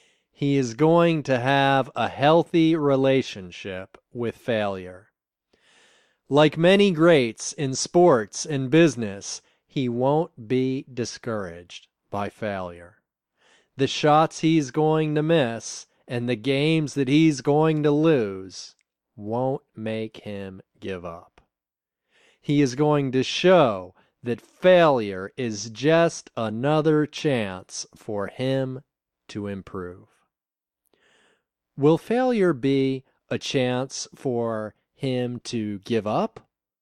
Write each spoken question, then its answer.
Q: Will failure be a chance for him to give up?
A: No, failure won't be a chance for him to give up.